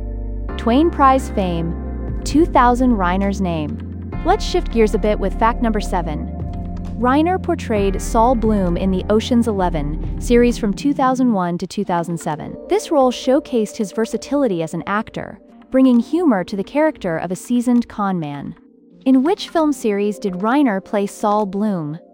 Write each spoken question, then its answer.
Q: In which film series did Reiner play Saul Bloom?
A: Correct answer, Ocean's 11.